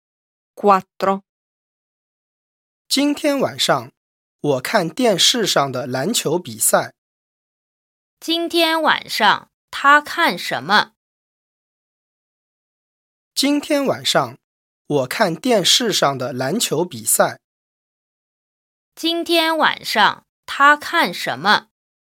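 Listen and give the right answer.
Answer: 电视上的篮球比赛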